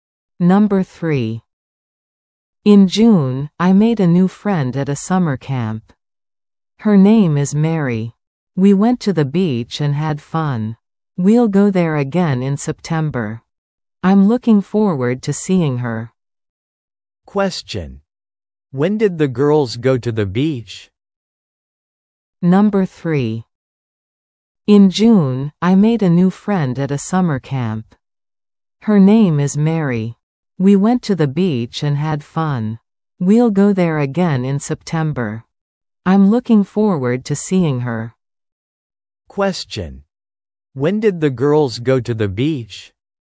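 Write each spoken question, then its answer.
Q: When did the girls go to the beach?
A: In June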